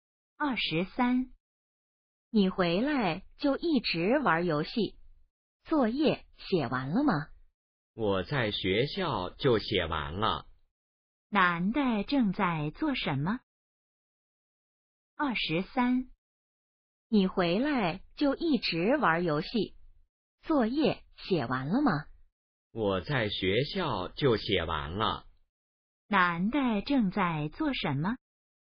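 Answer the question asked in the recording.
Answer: 玩游戏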